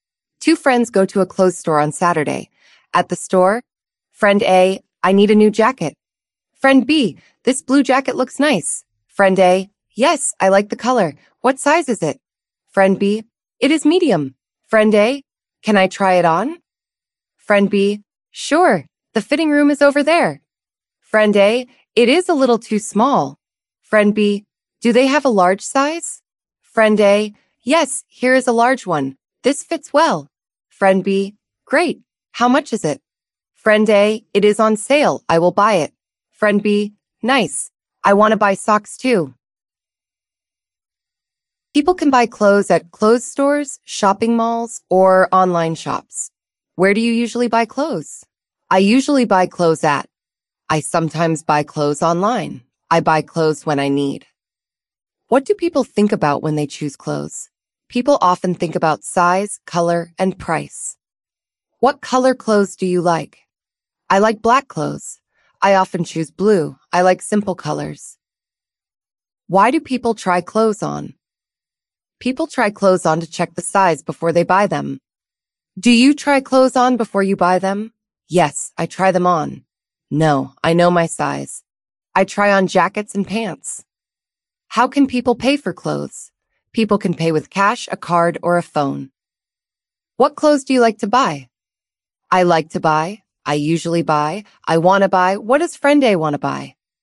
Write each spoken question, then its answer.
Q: What does friend A want to buy?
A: Friend A wants to buy a new jacket.